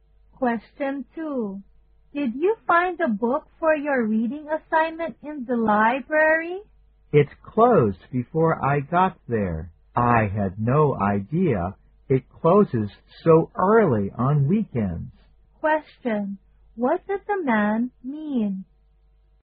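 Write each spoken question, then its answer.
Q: What did the man mean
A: He didn't get a book because the library had already closed.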